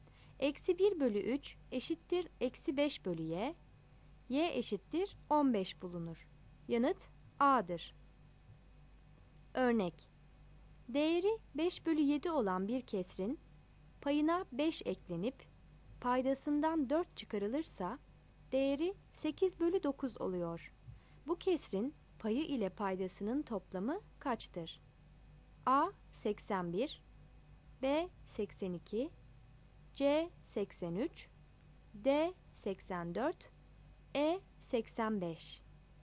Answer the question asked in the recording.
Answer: Yanıt D'dir.